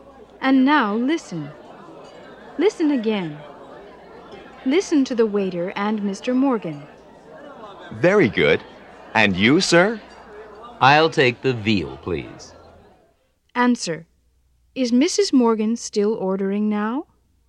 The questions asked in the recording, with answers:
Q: Is Mrs. Morgan still ordering now?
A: No, she's not.